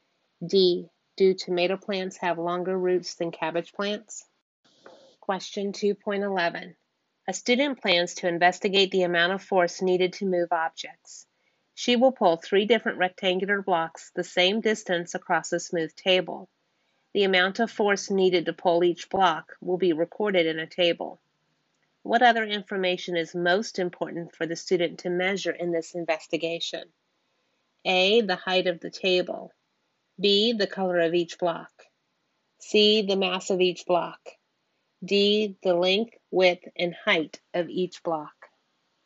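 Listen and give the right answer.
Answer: C: The mass of each block.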